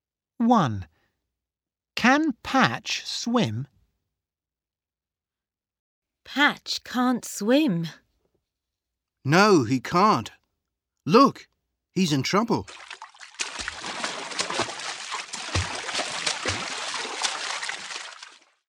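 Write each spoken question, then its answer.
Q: Can Patch swim?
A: No, he can't.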